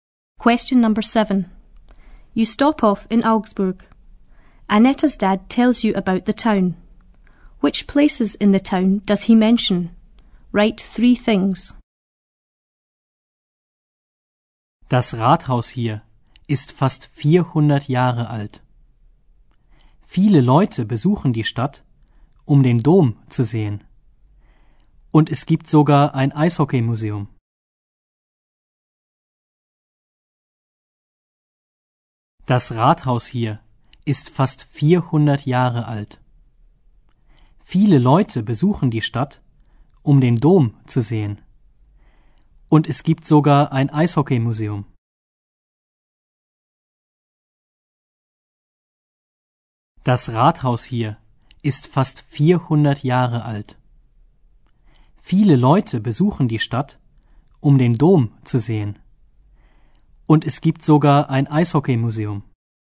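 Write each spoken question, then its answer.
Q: Which places in the town does he mention?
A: The town hall, the cathedral, an ice hockey museum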